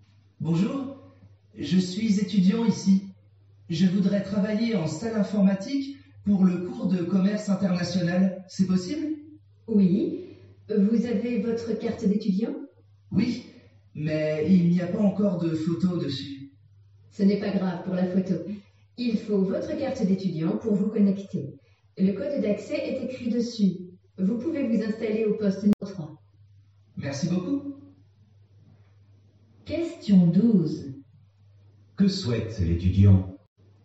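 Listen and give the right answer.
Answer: Travailler en salle informatique pour le cours de commerce international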